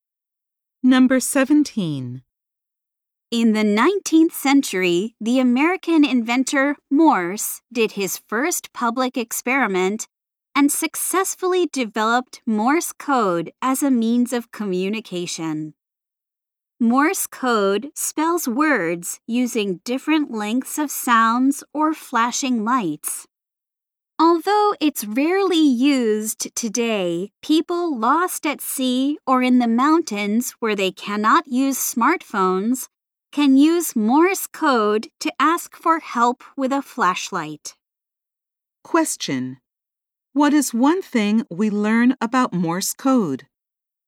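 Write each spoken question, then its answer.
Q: What is one thing we learn about Morse code?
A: People lost at sea or in the mountains can use it with a flashlight to ask for help.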